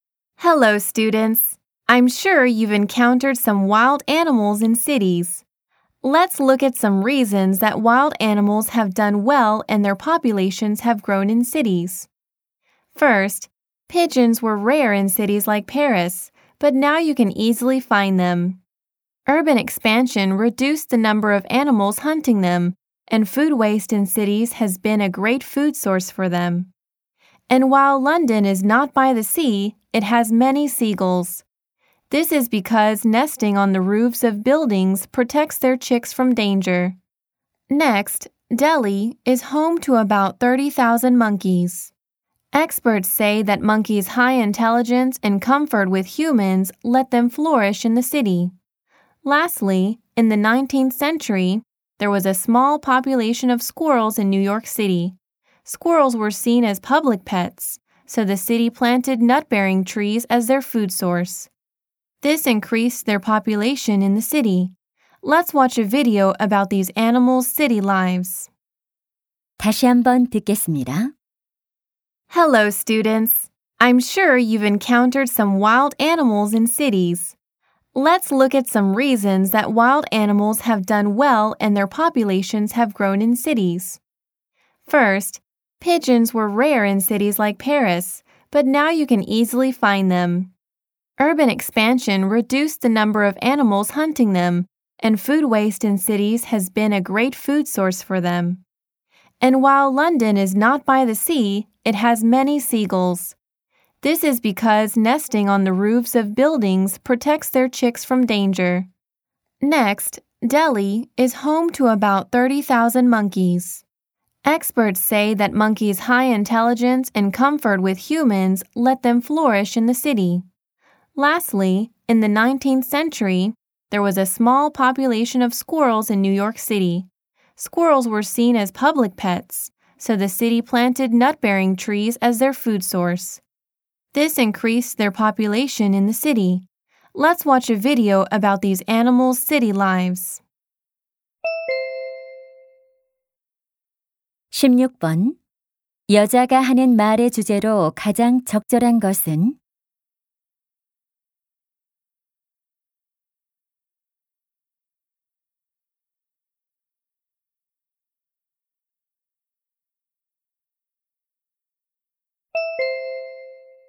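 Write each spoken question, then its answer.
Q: 여자가 하는 말의 주제로 가장 적절한 것은?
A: 야생 동물들이 도시에서 번성하게 된 이유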